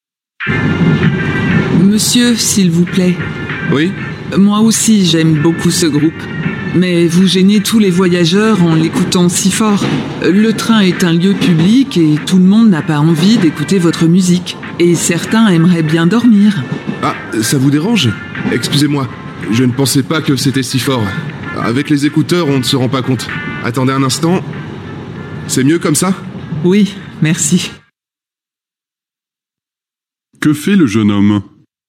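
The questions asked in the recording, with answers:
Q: Que fait le jeune homme ?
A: Il baisse le volume de sa musique.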